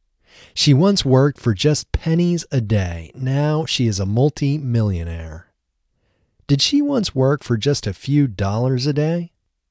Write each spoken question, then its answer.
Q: Did she once work for just a few dollars a day?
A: No, she didn't once work for just a few dollars a day.